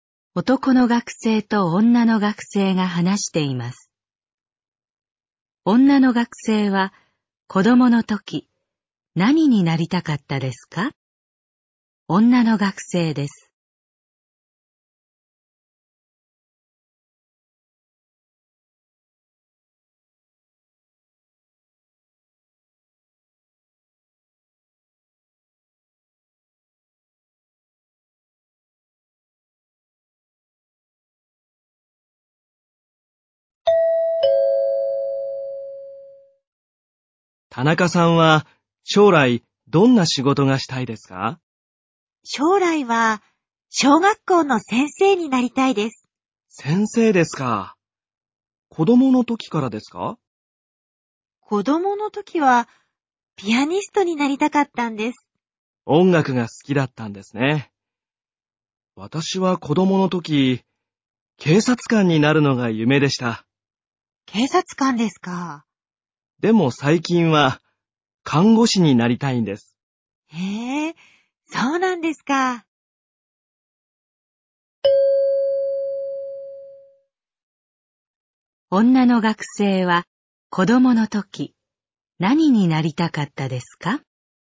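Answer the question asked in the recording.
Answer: ピアニスト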